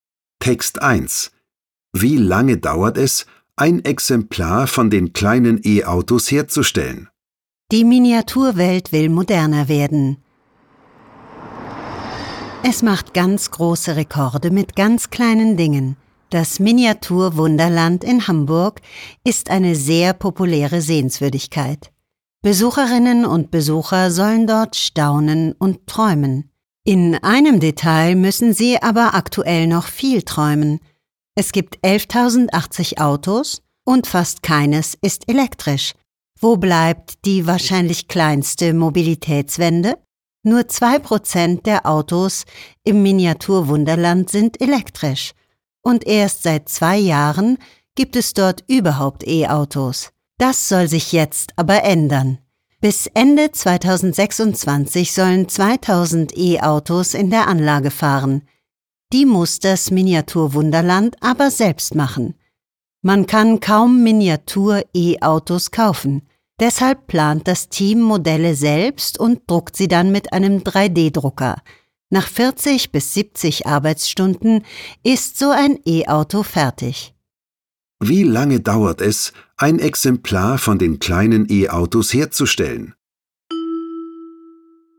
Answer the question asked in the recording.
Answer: 40 bis 70 Stunden dauert die Arbeit an einem Miniatur-E-Auto.